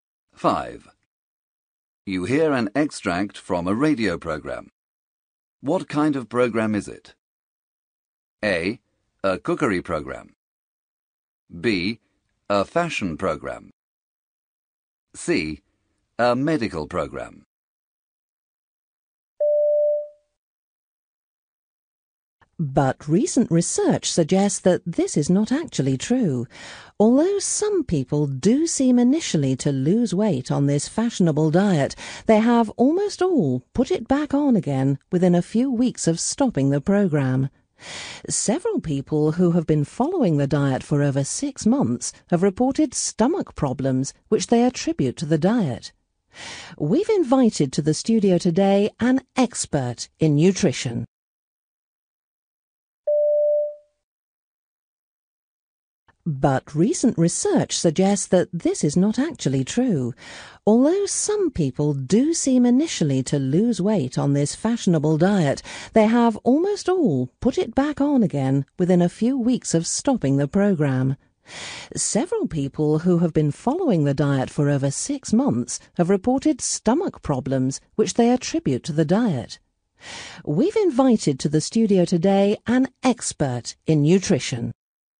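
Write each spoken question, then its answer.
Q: What kind of program is it?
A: C: A medical program.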